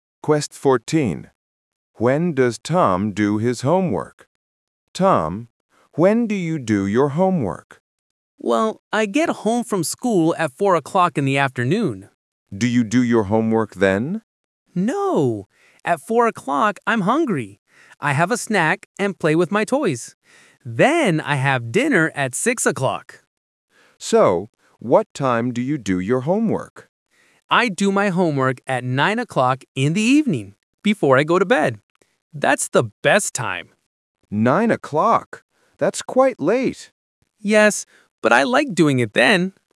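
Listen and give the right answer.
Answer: At 9 o'clock in the evening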